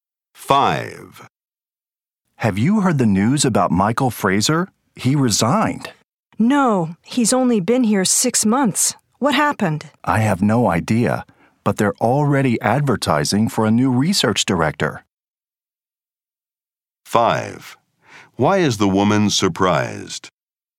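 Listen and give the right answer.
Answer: Michael Fraser resigned after only 6 months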